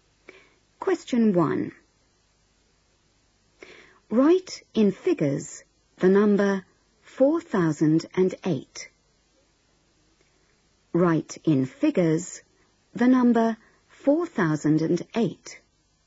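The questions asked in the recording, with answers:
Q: Write in figures the number 4008.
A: 4008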